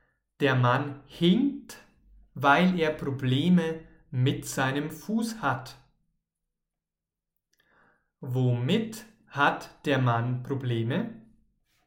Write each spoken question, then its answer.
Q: Womit hat der Mann Probleme?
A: Mit seinem Fuß. Der Mann hat Probleme mit seinem Fuß.